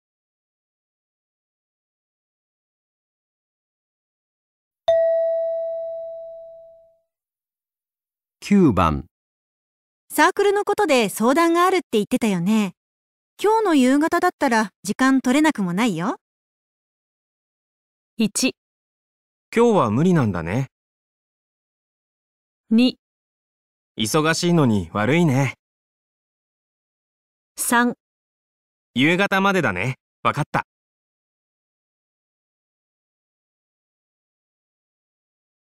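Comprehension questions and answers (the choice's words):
ホクサークルのことで相談があるって言ってたよね? 今日の夕方だったら時間取れなくもないよ。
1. 今日は無理なんだね。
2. 忙しいのに悪いね。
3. 夕方までだね。分かった!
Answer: 忙しいのに悪いね。

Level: 【N1 第1回】聴解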